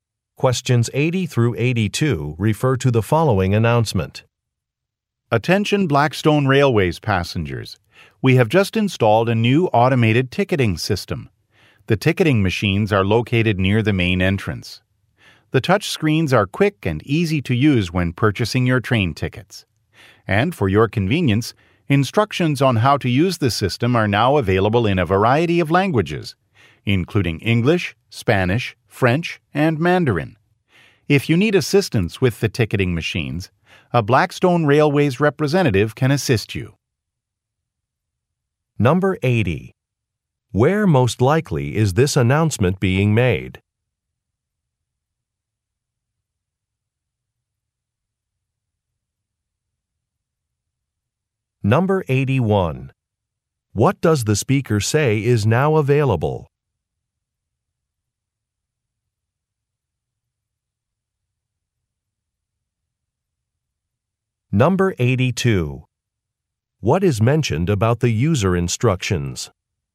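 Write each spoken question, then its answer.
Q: Where most likely is this announcement being made?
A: At a train station

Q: What does the speaker say is now available?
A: A new automated ticketing system

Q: What is mentioned about the user instructions?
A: They are available in several languages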